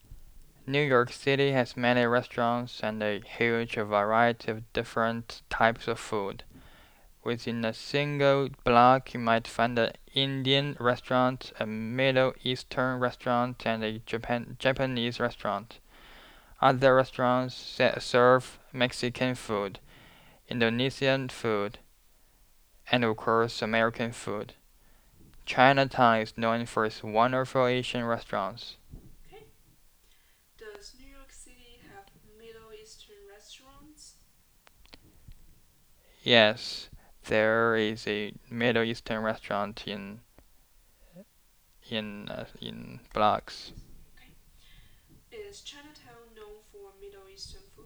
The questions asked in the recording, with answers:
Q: Does New York City have Middle Eastern restaurants?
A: Yes, there is a Middle Eastern restaurant

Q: Is Chinatown known for Middle Eastern food?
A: No, Chinatown is known for its Asian food.